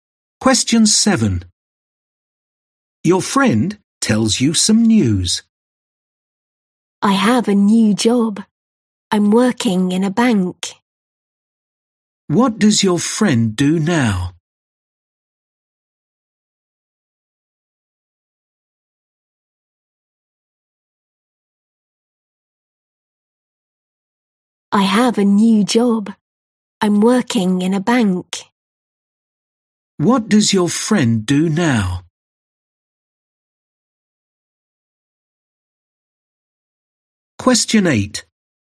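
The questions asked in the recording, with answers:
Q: What does your friend do now?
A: Works in a bank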